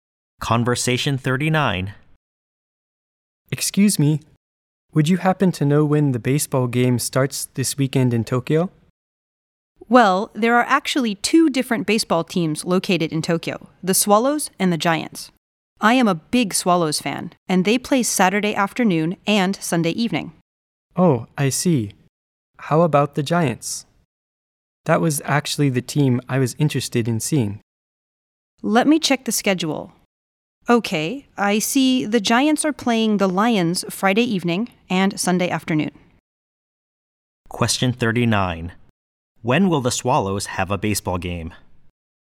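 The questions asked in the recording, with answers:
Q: When will the Swallows have a baseball game?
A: Saturday afternoon and Sunday evening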